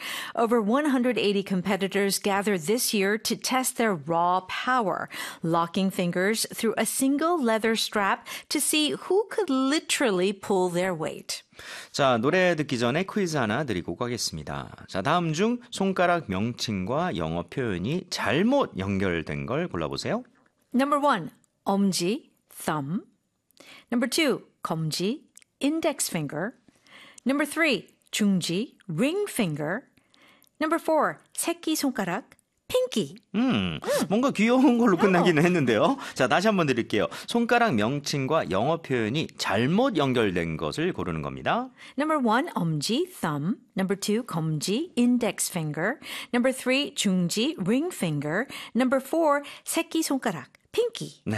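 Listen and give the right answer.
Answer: 3: 중지, ring finger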